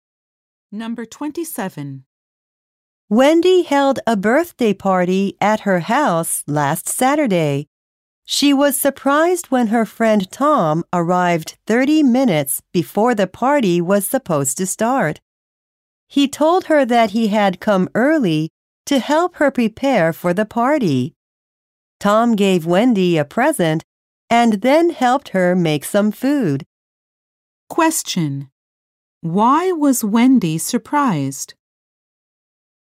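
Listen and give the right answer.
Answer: Tom arrived 30 minutes early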